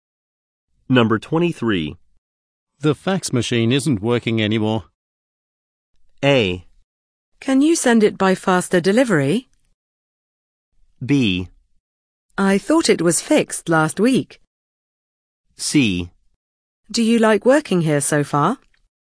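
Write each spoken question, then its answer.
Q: The fax machine isn't working anymore.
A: B: I thought it was fixed last week.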